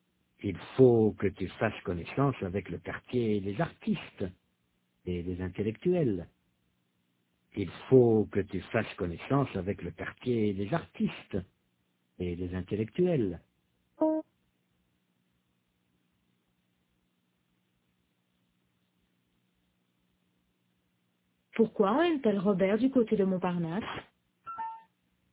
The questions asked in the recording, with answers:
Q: Pourquoi aime-t-elle Robert du côté de Montparnasse?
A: Parce qu'il faut qu'il fasse connaissance avec le quartier des artistes et des intellectuels.